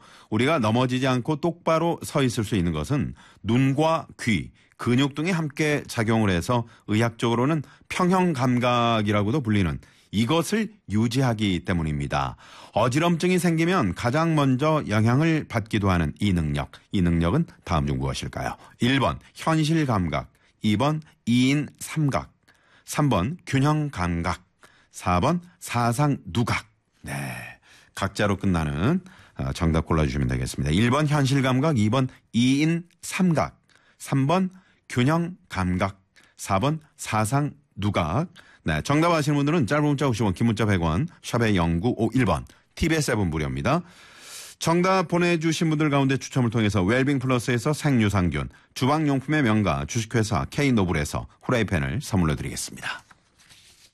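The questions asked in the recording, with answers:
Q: 이 능력은 다음 중 무엇일까요? 1번 현실감각, 2번 이인삼각, 3번 균형감각, 4번 사상누각.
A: 3: 균형감각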